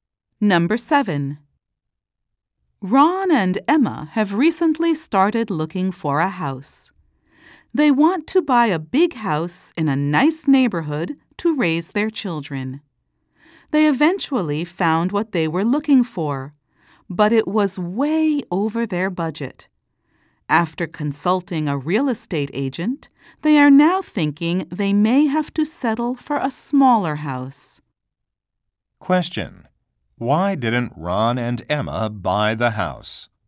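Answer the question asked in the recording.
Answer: It was way over their budget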